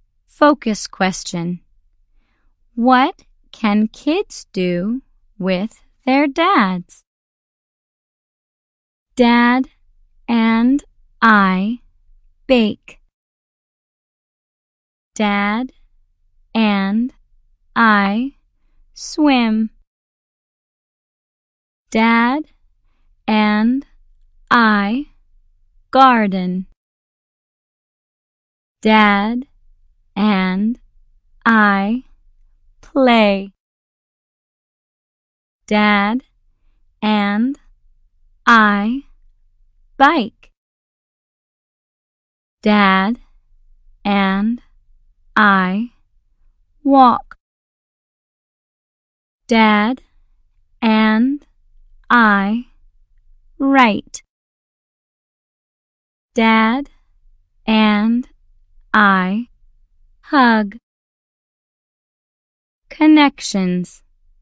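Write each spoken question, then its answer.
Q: What can kids do with their dads?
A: Bake, swim, garden, play, bike, walk, write and hug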